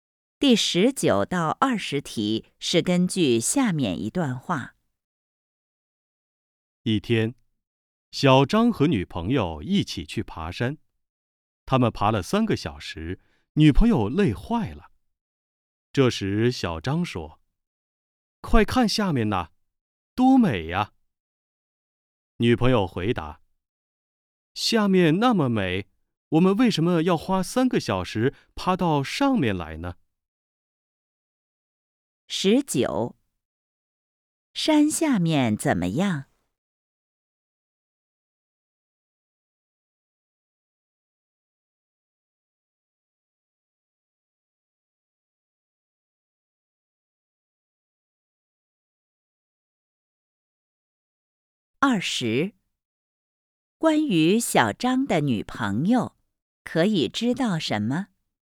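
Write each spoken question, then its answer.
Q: 山下面怎么样?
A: 很美

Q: 关于小张的女朋友,可以知道什么?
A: 她爬山累坏了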